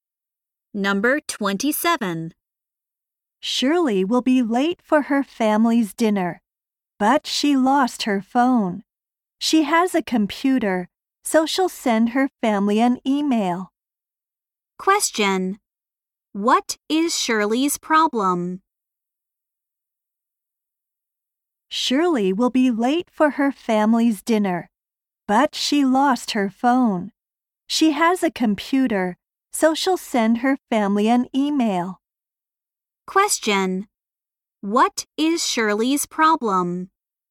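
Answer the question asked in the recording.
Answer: She lost her phone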